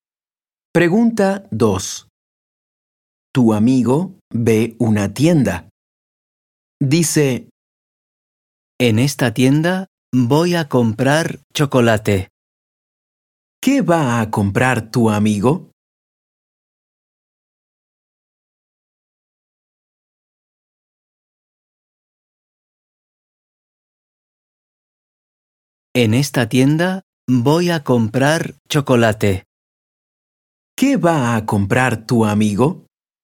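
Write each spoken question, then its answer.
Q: ¿Qué va a comprar tu amigo?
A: Chocolate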